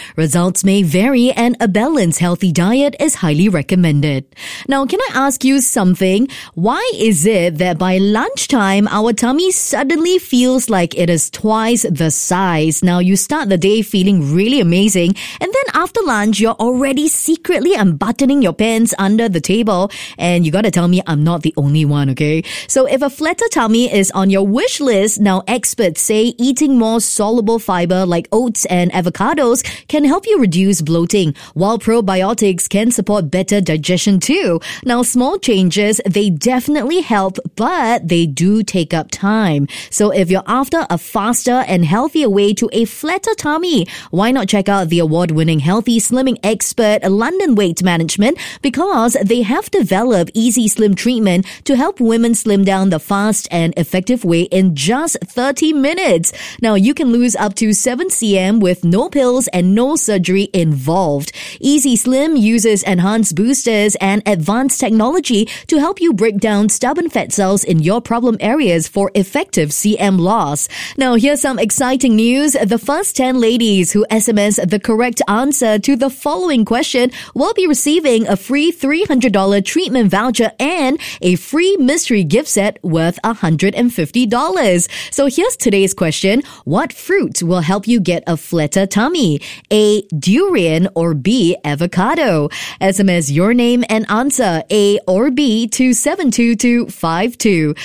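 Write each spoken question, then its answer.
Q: What fruit will help you get a flatter tummy?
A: B: Avocado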